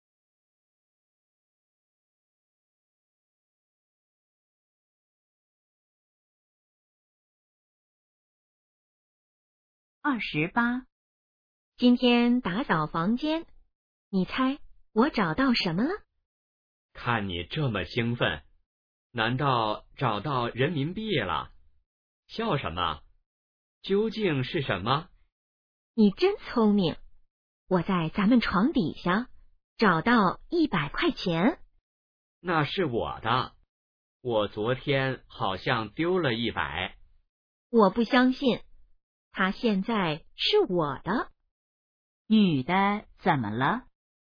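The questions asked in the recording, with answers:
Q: 女的怎么了?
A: 找到了100块钱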